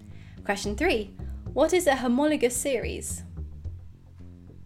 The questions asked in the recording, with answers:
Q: What is a homologous series?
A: A homologous series is compounds with the same functional group but different number of carbons, increasing by one.